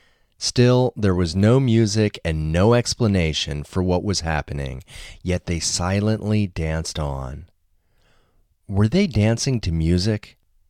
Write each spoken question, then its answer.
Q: Were they dancing to music?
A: No, they weren't dancing to music.